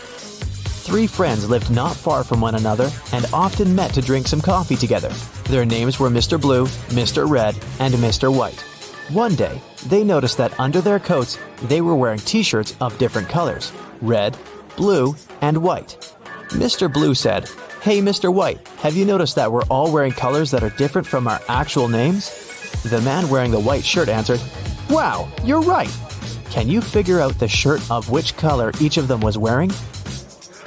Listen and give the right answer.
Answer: That means that Mr. Blue can only be wearing the red shirt, and Mr.